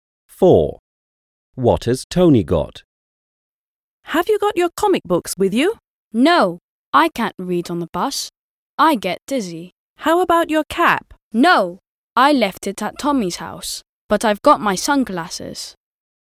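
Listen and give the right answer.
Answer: His sunglasses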